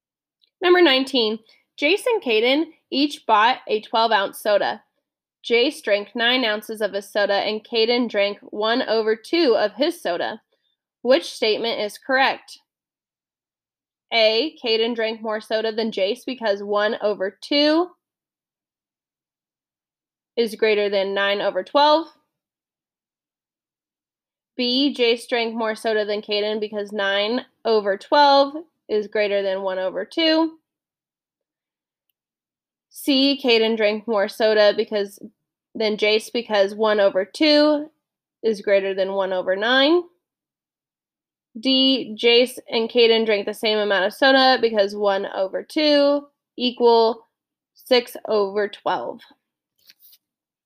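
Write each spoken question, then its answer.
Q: Which statement is correct?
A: B: Jace drank more soda than Caden because 9 over 12 is greater than 1 over 2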